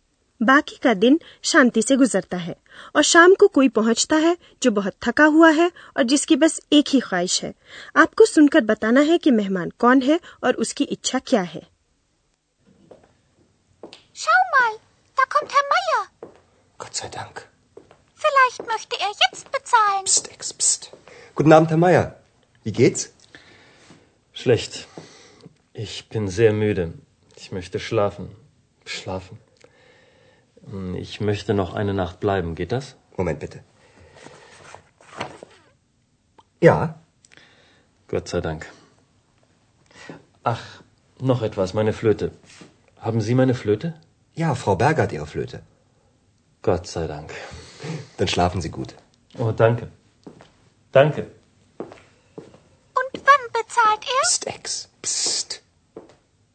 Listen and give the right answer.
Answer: श्री मायर ही वापस लौट कर आए हैं और उनकी एक ही इच्छा है वे सोना चाहते हैं